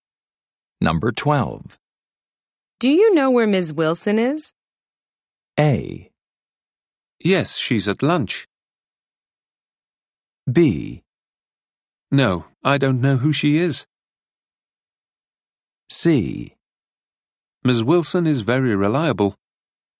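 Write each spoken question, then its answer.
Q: Do you know where Ms. Wilson is?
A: A: Yes, she's at lunch.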